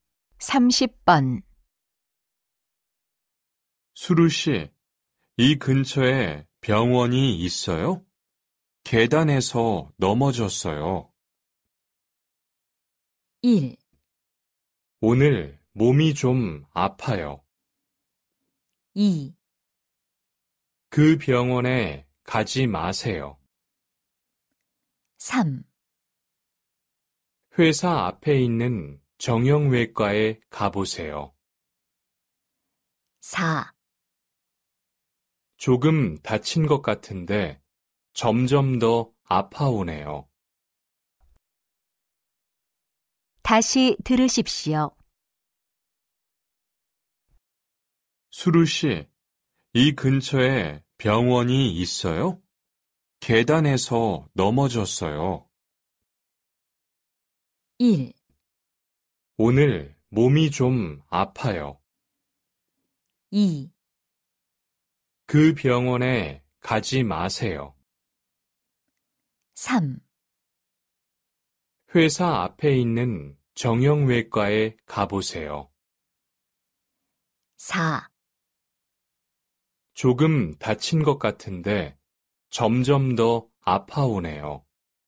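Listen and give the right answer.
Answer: 3: 회사 앞에 있는 정형외과에 가보세요.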